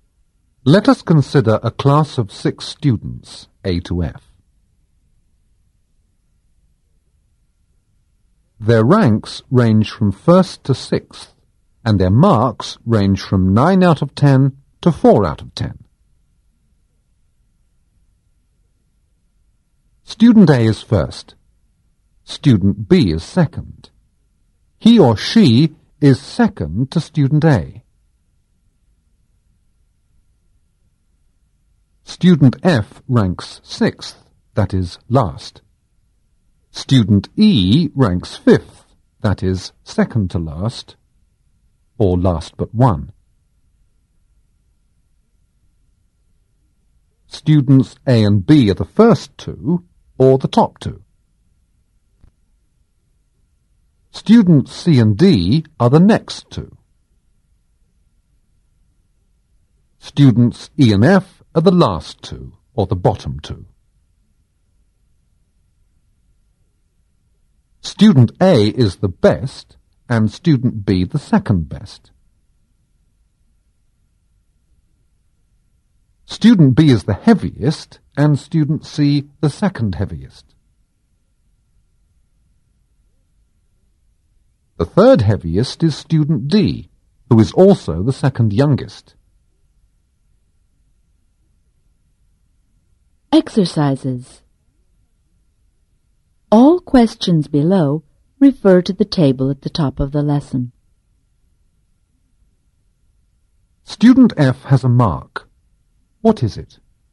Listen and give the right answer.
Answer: It is 4 out of 10.